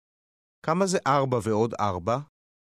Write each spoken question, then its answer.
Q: כמה זה 4 ועוד 4?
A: 8. 8.